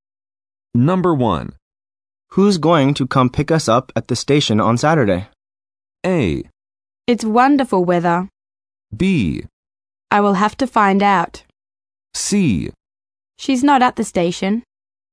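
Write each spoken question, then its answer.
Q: Who's going to come pick us up at the station on Saturday?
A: B: I will have to find out.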